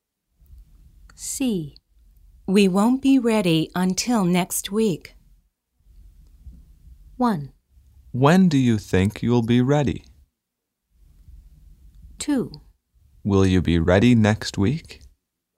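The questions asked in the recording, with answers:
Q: We won't be ready until next week.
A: 1: When do you think you'll be ready?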